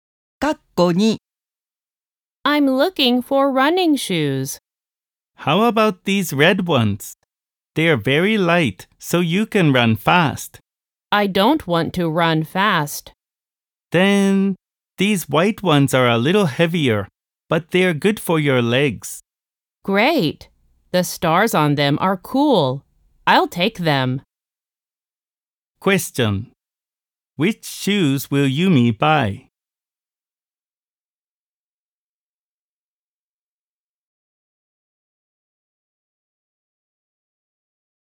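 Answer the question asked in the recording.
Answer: The white ones with stars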